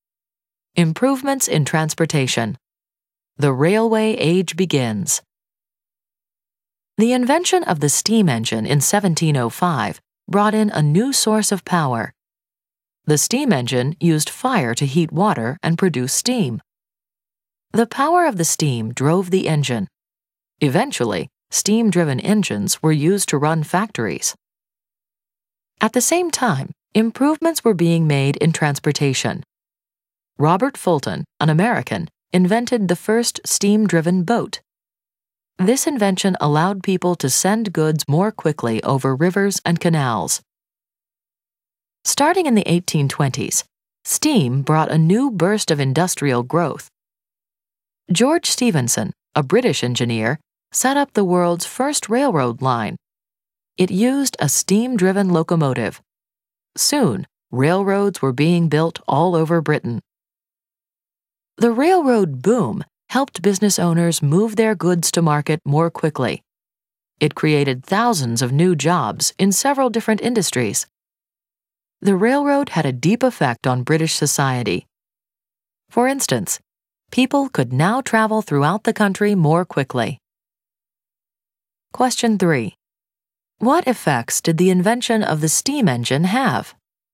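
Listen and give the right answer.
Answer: It powered factories, steamboats and railroads, moving goods faster, creating jobs and letting people travel more quickly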